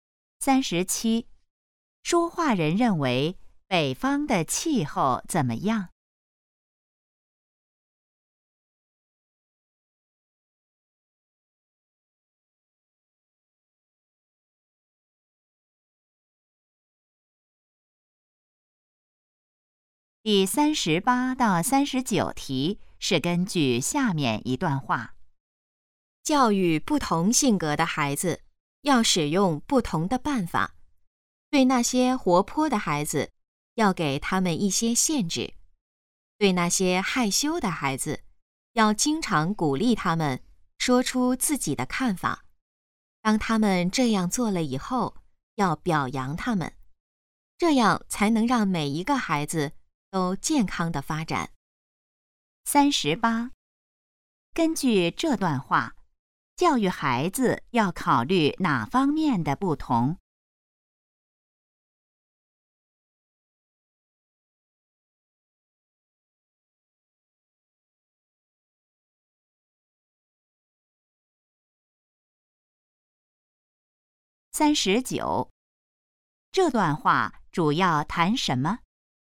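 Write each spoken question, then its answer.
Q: 根据这段话,教育孩子要考虑哪方面的不同?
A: 性格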